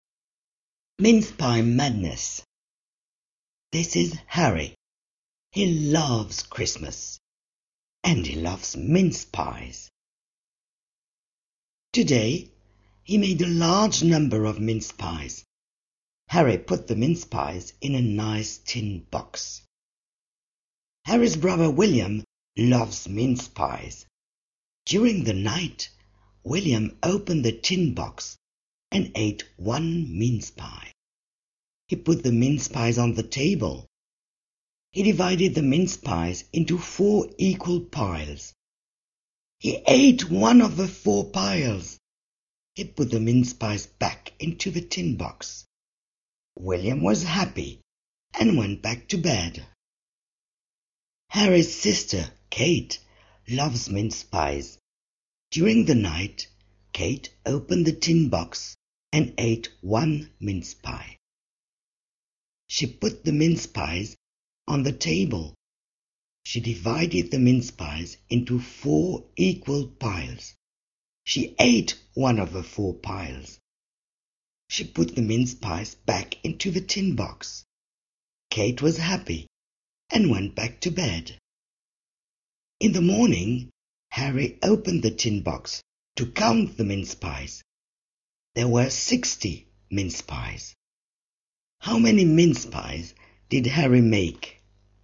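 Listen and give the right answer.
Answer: 109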